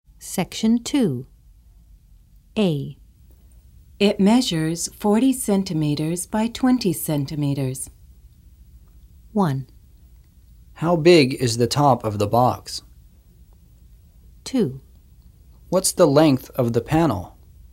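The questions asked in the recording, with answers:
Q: How big is the top of the box?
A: 1: How big is the top of the box?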